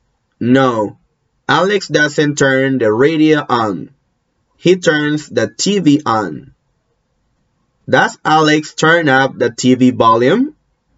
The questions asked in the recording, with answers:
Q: Does Alex turn up the TV volume?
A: No, no. He doesn't turn up the TV volume.